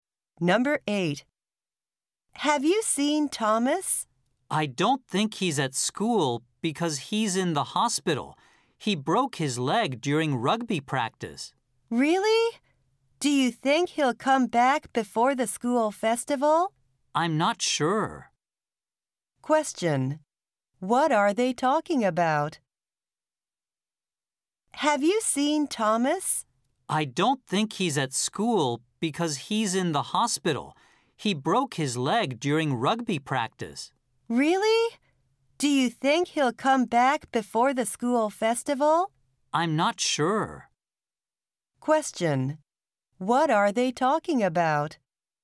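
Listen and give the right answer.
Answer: Thomas, who broke his leg during rugby practice and is in the hospital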